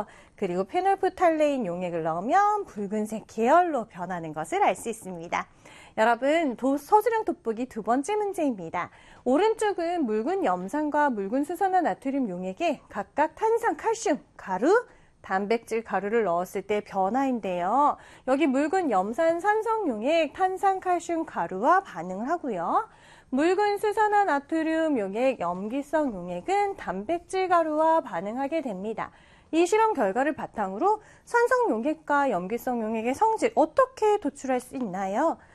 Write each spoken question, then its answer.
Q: 이 실험 결과를 바탕으로 산성 용액과 염기성 용액의 성질 어떻게 도출할 수 있나요?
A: 산성 용액은 탄산, 칼슘, 가루를 녹이고 염기성 용액은 단백질 가루를 녹인다 라고 정리하면 되겠죠?